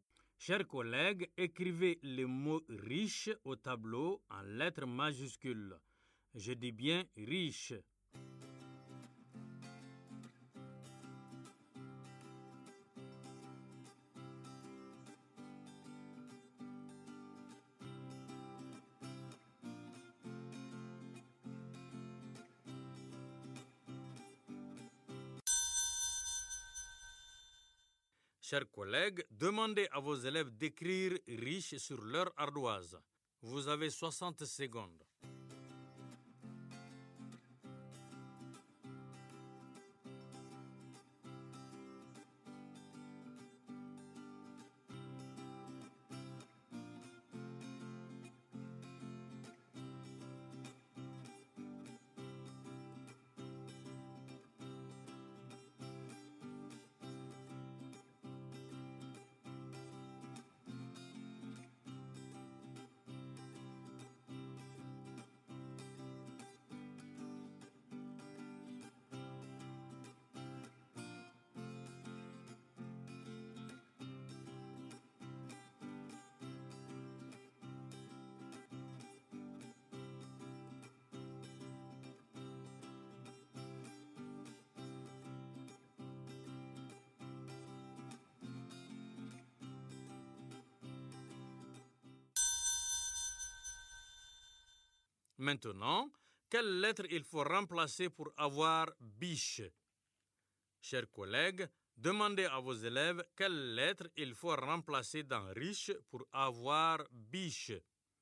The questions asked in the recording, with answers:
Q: Chers collègues, demandez à vos élèves quelle lettre il faut remplacer dans riche pour avoir biche.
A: Monsieur, c'est la lettre R.